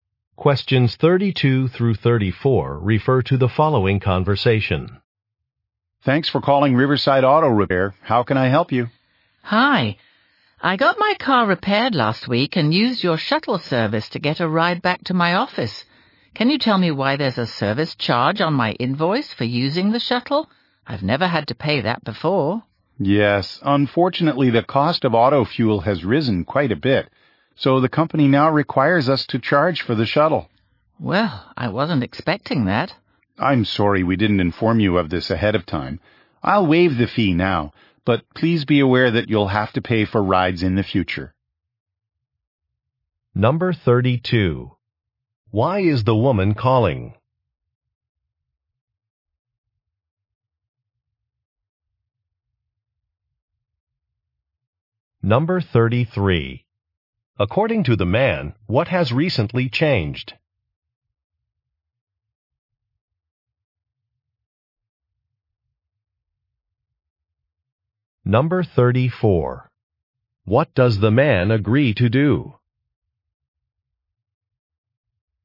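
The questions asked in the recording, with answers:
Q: Why is the woman calling?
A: To ask about a shuttle service charge on her invoice

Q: According to the man, what has recently changed?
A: The company now charges for the shuttle because fuel costs rose

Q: What does the man agree to do?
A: Waive the fee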